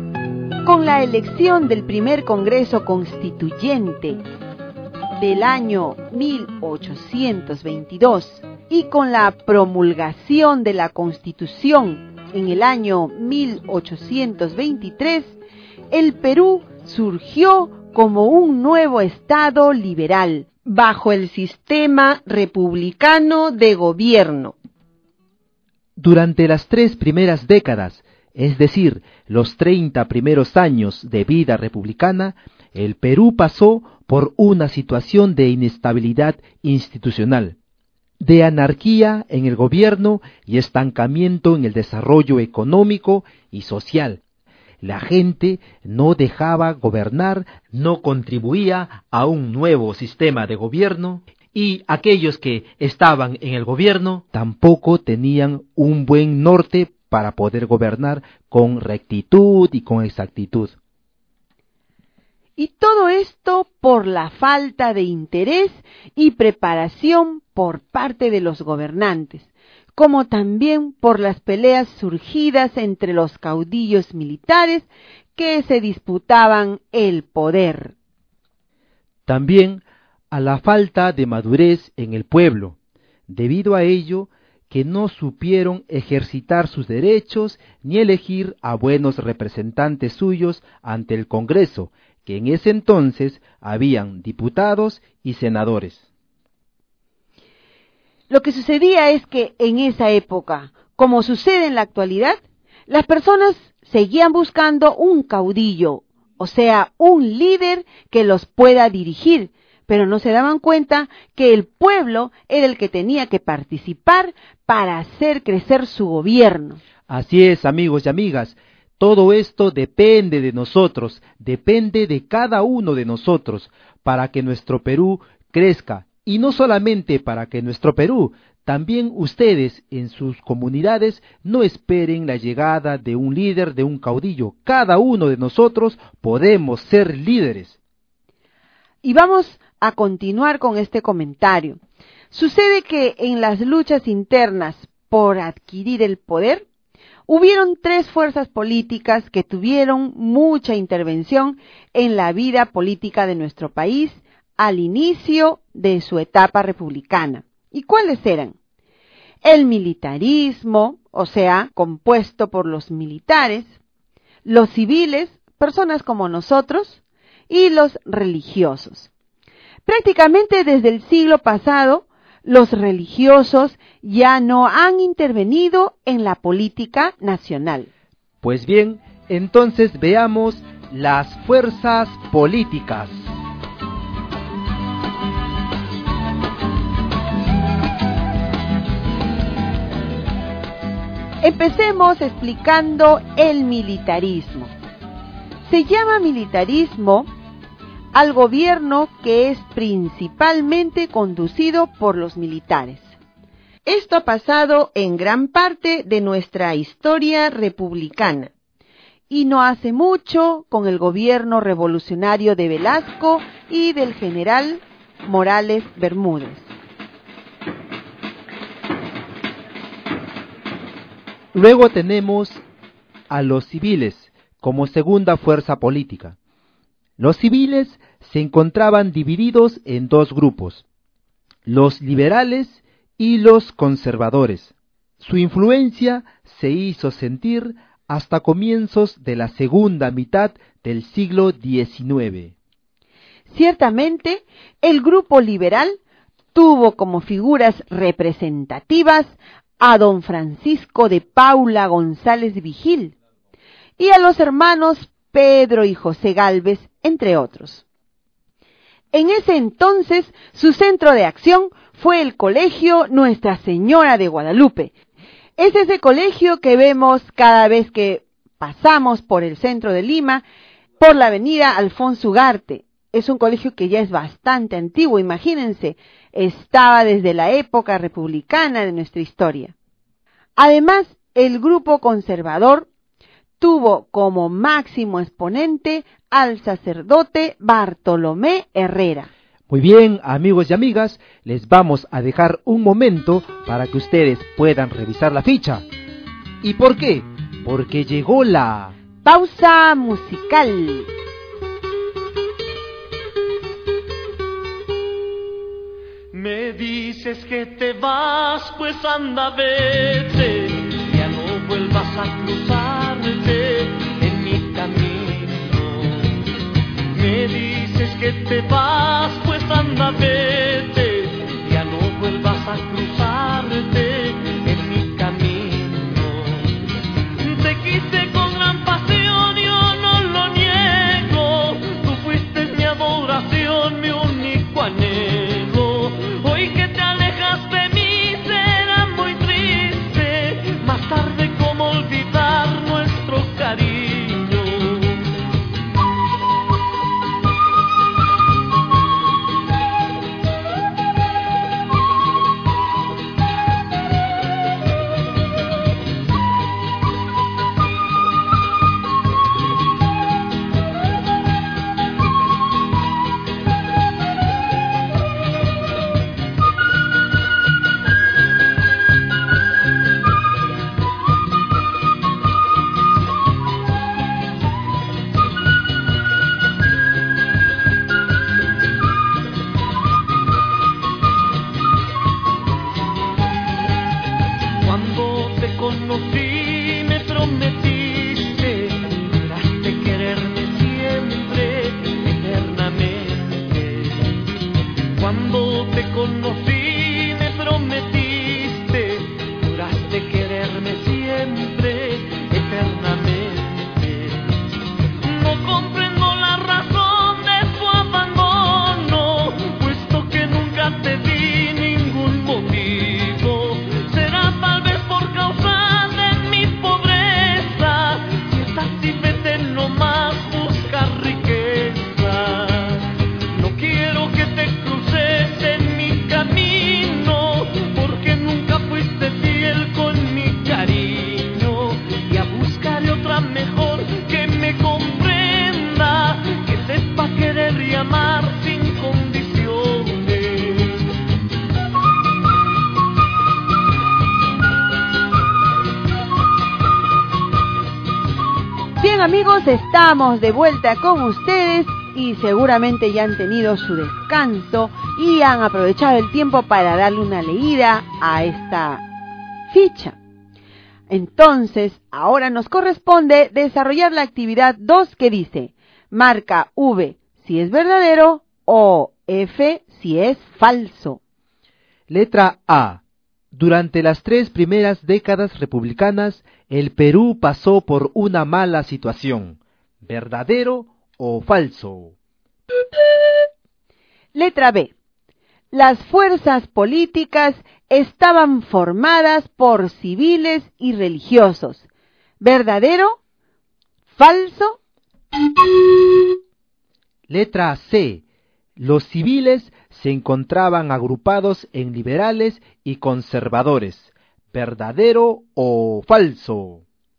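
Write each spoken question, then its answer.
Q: Letra A. Durante las tres primeras décadas republicanas, el Perú pasó por una mala situación.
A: Verdadero

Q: Letra B. Las fuerzas políticas estaban formadas por civiles y religiosos.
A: Falso (también los militares)

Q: Letra C. Los civiles se encontraban agrupados en liberales y conservadores.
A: Verdadero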